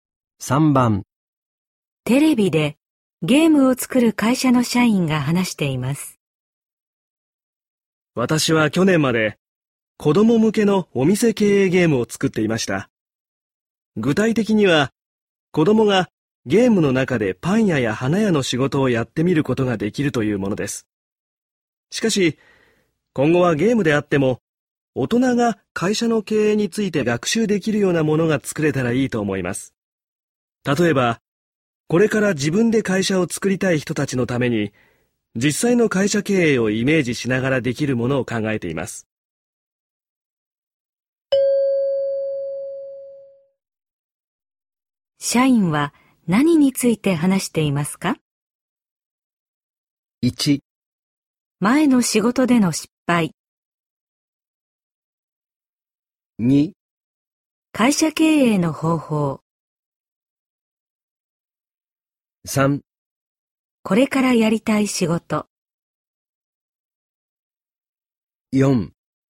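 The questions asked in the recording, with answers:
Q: 社員は何について話していますか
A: 3: これからやりたい仕事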